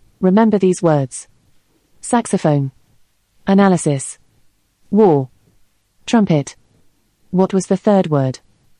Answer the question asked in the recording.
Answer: correct answer was war.